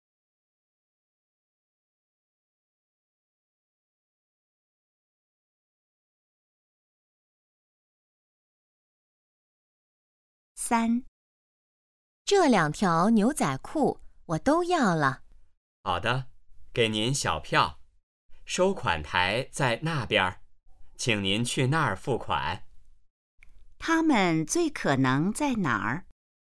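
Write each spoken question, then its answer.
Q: 他们最可能在哪儿?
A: 商店(服装店)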